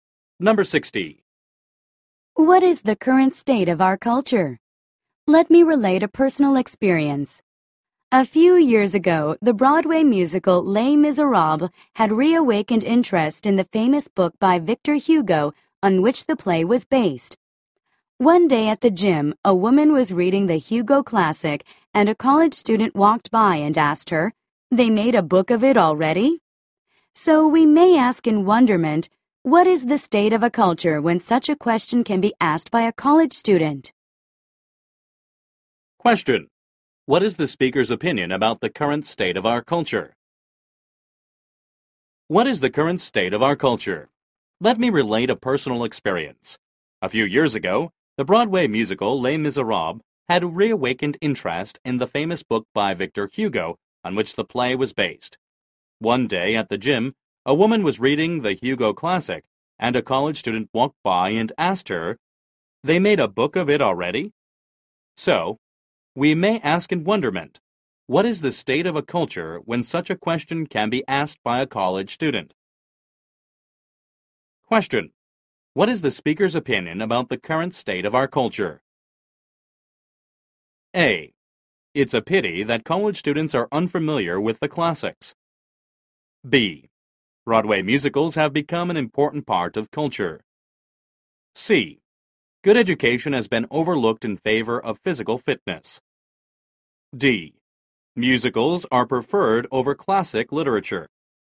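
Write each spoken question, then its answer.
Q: What is the speaker's opinion about the current state of our culture?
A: A: It's a pity that college students are unfamiliar with the classics.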